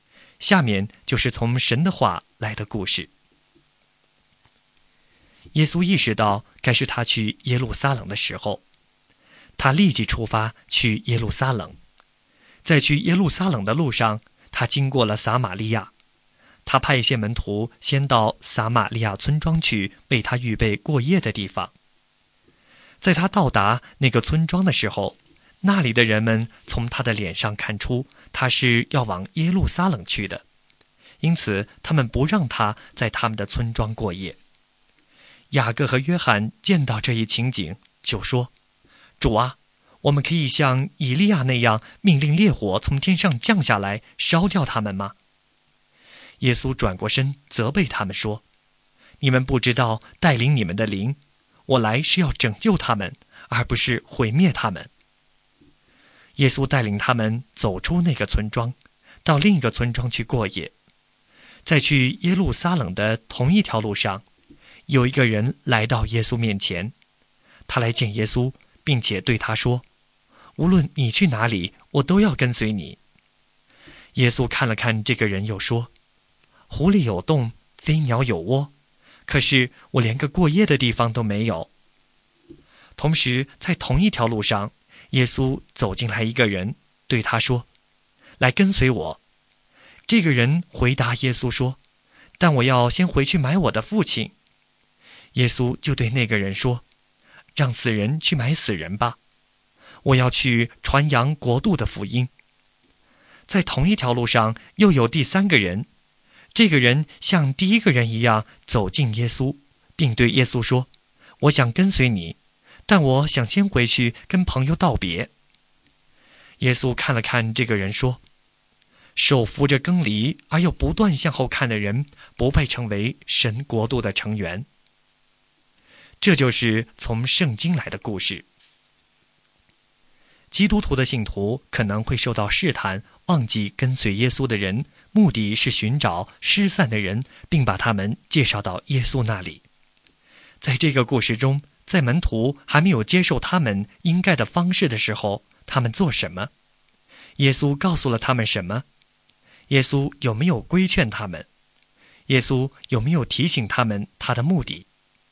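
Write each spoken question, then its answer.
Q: 耶稣告诉了他们什么?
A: 耶稣责备他们:你们不知道带领你们的灵,我来是要拯救他们,而不是毁灭他们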